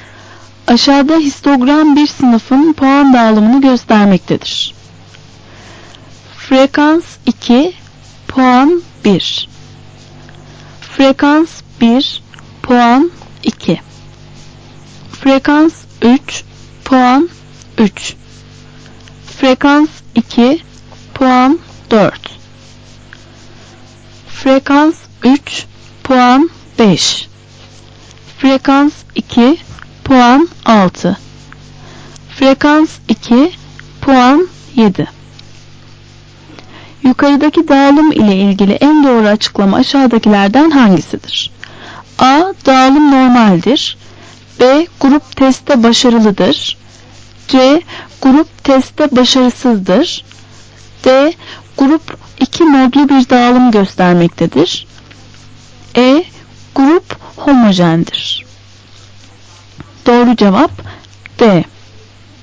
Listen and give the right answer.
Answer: Doğru cevap D.